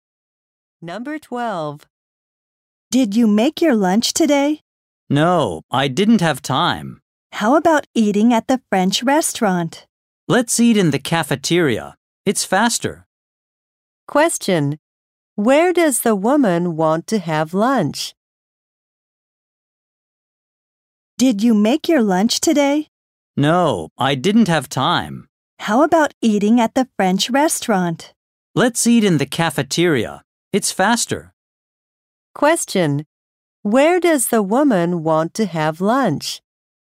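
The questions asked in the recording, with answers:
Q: Where does the woman want to have lunch?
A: In the cafeteria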